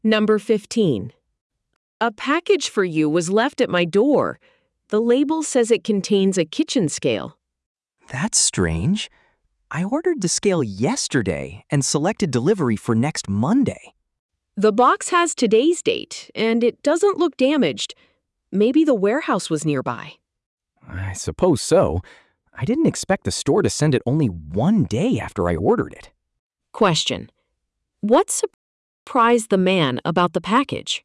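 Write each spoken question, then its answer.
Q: What surprised the man about the package?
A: It arrived only one day after he ordered it, earlier than the Monday delivery he chose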